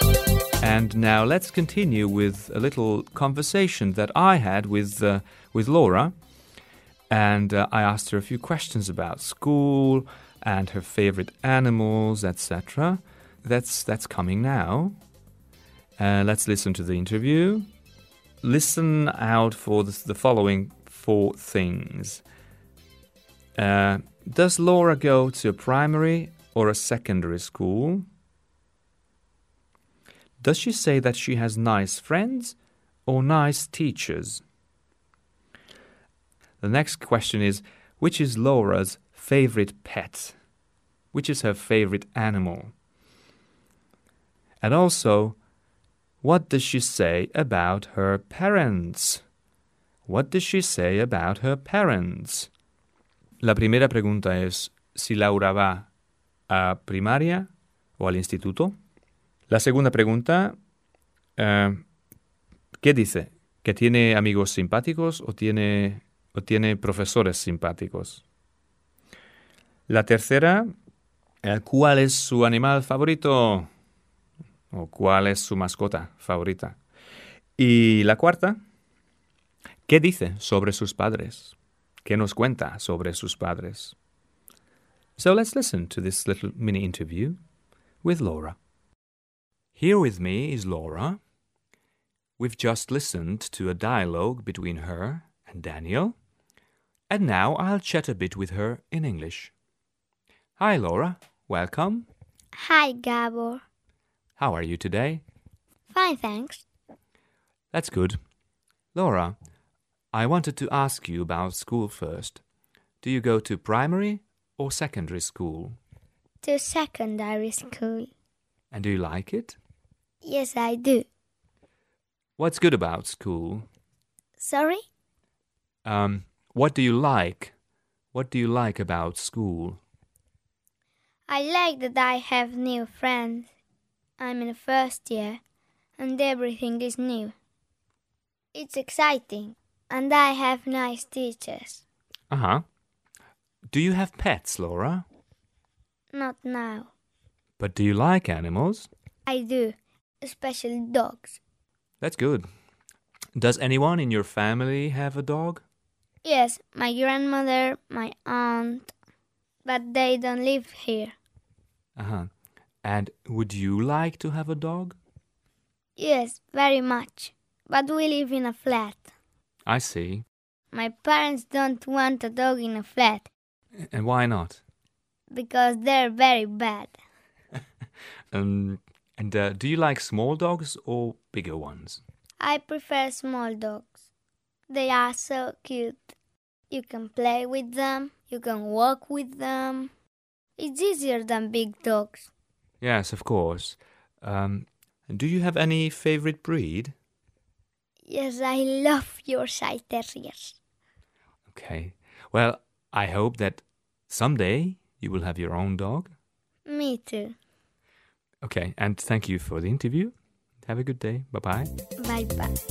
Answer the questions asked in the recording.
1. She's a secondary school student.
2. She says she has nice teachers.
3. Her favorite pet is a dog.
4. And she says that her parents don't want a dog because they live in a flat.